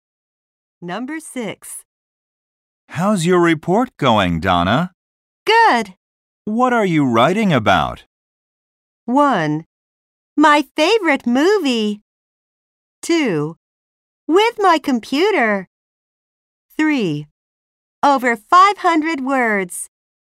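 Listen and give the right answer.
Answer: 1: My favorite movie.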